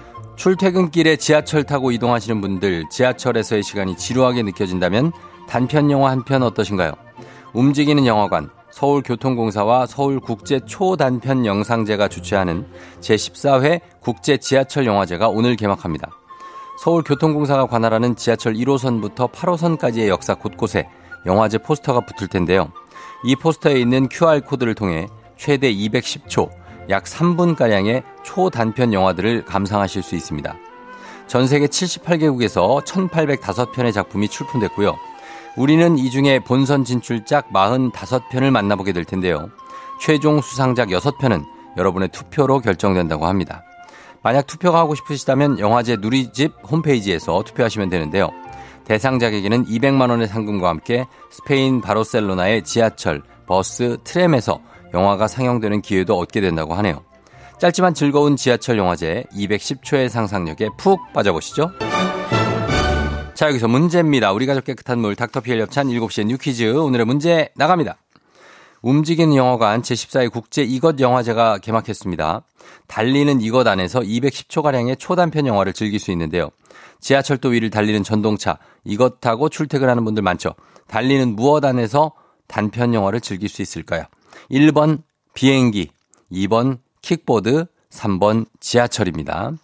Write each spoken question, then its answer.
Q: 달리는 무엇 안에서 단편 영화를 즐길 수 있을까요?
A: 정답 3번 지하철입니다.